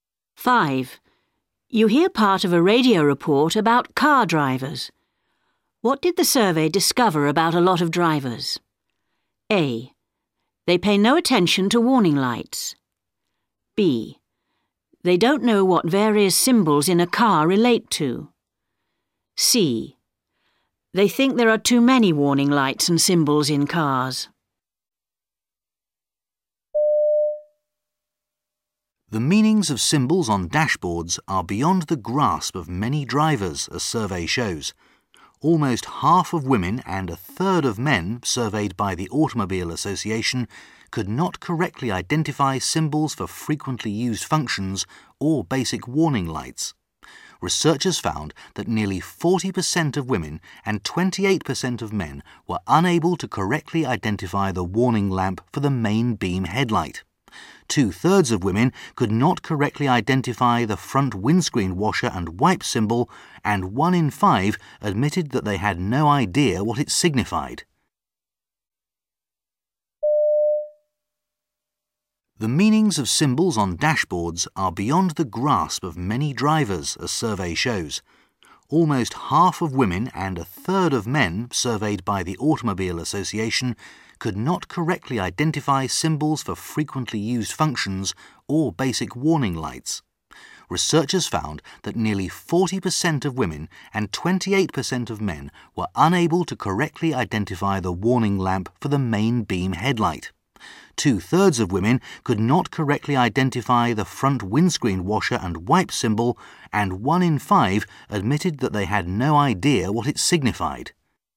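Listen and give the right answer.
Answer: B: They don't know what various symbols in a car relate to.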